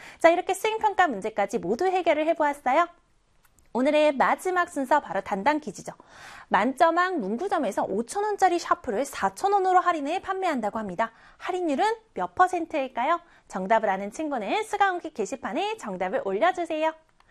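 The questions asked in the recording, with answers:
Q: 할인율은 몇 퍼센트일까요?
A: 20%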